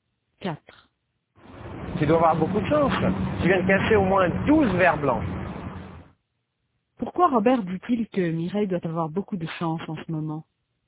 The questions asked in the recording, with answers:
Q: Pourquoi Robert dit-il que Mireille doit avoir beaucoup de chance en ce moment?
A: Parce qu'elle vient de casser 12 verres blancs.